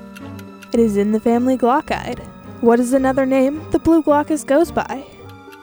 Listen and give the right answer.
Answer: The blue glaucus has been called the blue dragon, the sea swallow, and the blue angel.